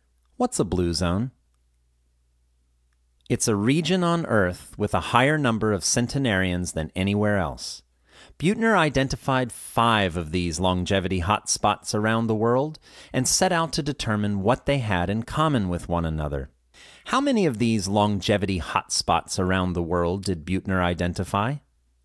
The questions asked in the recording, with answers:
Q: How many of these longevity hotspots around the world did Buettner identify?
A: He identified five of these longevity hotspots around the world.